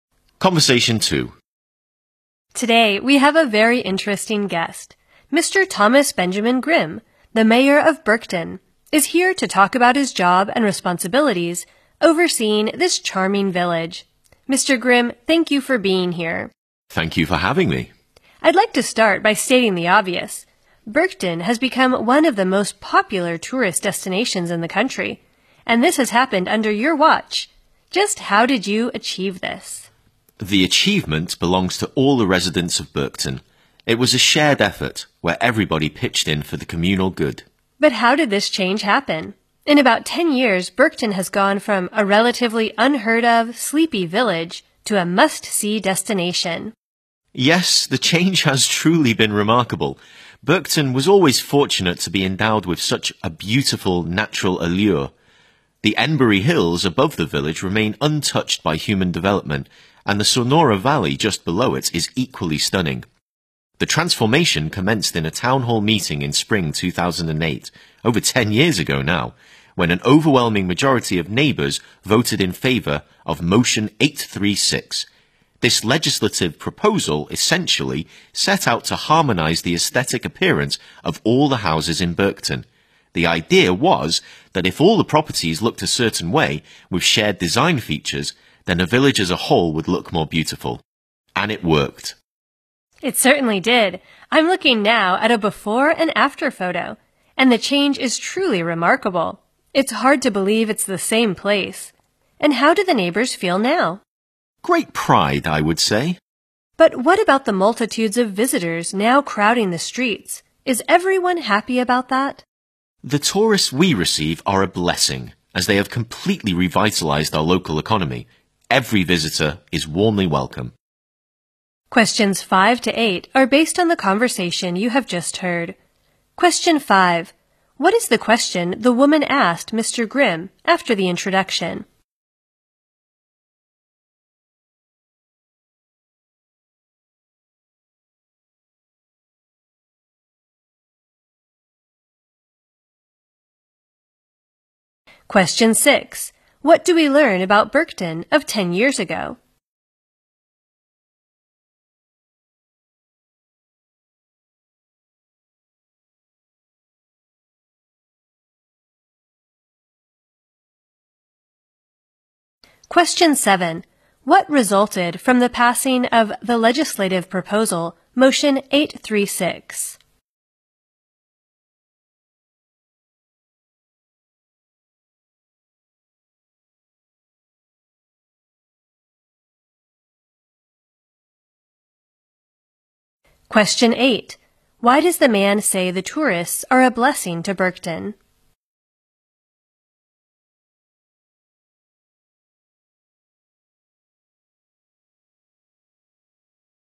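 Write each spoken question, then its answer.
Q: What is the question the woman asked Mr.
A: How he made Berkton one of the country's most popular tourist destinations

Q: What do we learn about Berkton of 10 years ago?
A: It was a relatively unheard-of, sleepy village

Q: What resulted from the passing of the legislative proposal, Motion 836?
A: All the houses got a matching look, so the whole village became more beautiful

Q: Why does the man say the tourists are a blessing to Berkton?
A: They have completely revitalized the local economy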